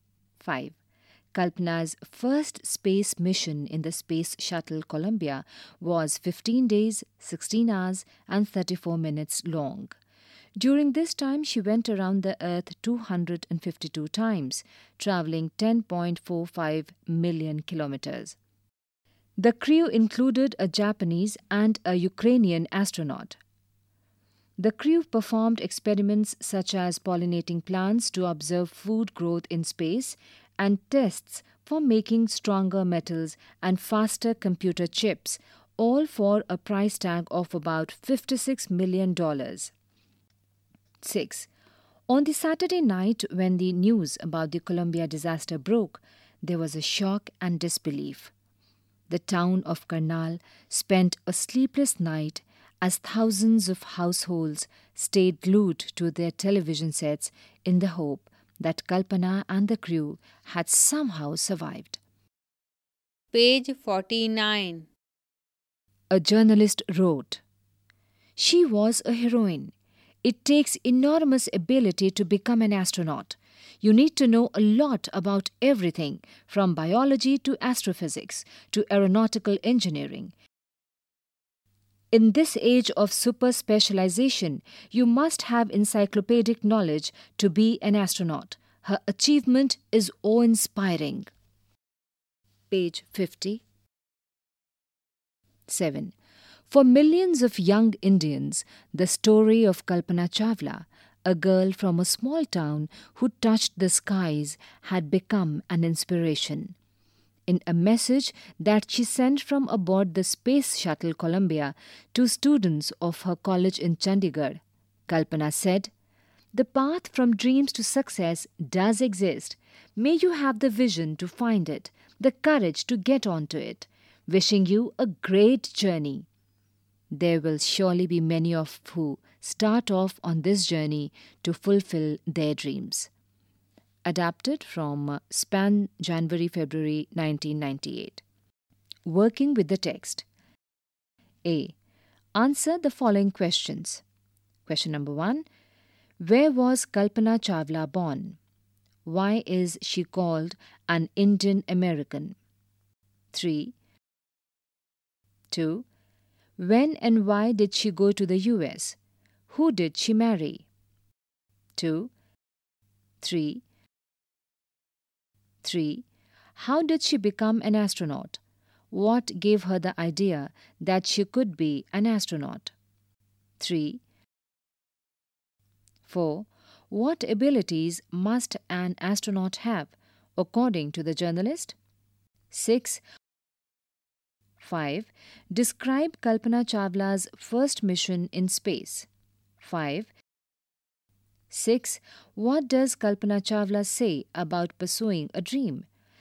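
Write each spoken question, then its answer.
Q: What abilities must an astronaut have, according to the journalist?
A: Enormous ability and encyclopedic knowledge of everything, from biology to astrophysics to aeronautical engineering

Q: Describe Kalpana Chawla's first mission in space.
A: On Space Shuttle Columbia she spent 15 days, 16 hours and 34 minutes in space, went around the Earth 252 times and travelled 10.45 million km; the crew did experiments such as pollinating plants and tests for stronger metals and faster computer chips

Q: What does Kalpana Chawla say about pursuing a dream?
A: The path from dreams to success does exist; you need the vision to find it and the courage to get onto it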